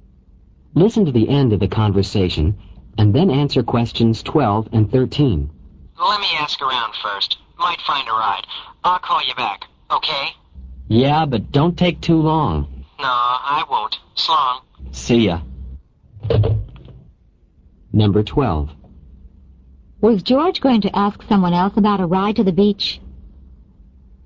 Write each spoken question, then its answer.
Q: Was George going to ask someone else about a ride to the beach?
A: A. Yes, he was.